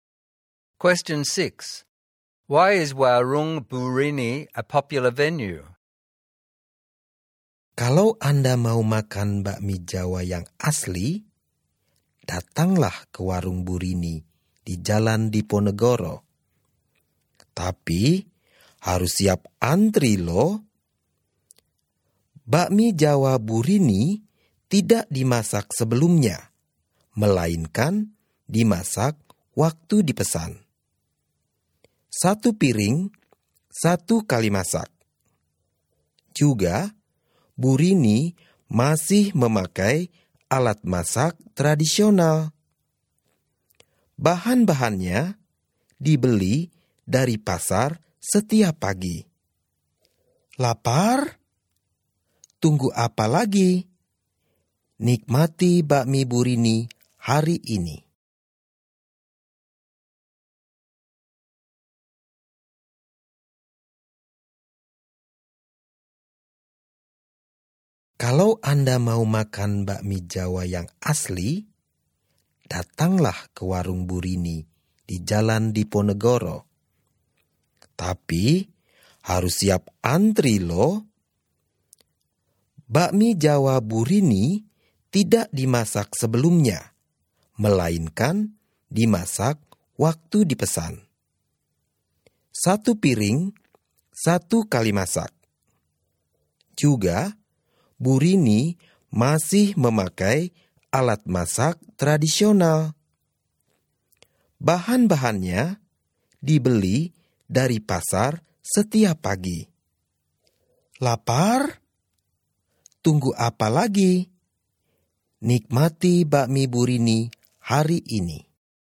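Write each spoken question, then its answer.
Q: Why is Warung Burini a popular venue?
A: It serves authentic Javanese bakmi cooked to order one plate at a time, using traditional cooking tools and ingredients bought fresh from the market every morning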